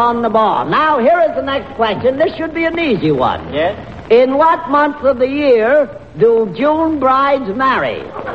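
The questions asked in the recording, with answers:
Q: In what month of the year do June brides marry?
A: June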